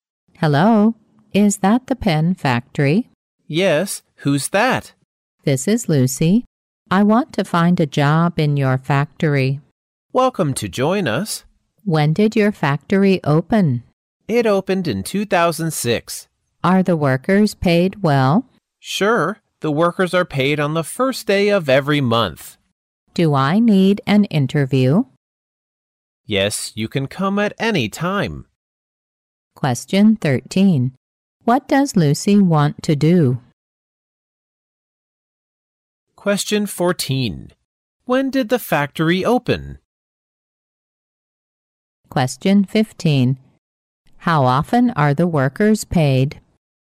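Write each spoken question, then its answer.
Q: What does Lucy want to do?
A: Find a job in the pen factory

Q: When did the factory open?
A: In 2006

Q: How often are the workers paid?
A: Once a month, on the first day of every month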